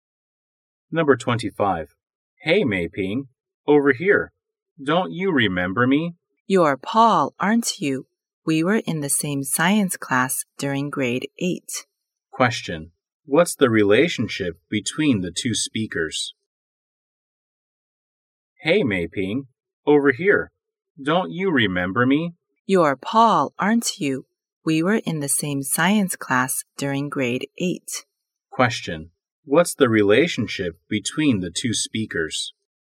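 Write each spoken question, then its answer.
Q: What's the relationship between the two speakers?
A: Classmates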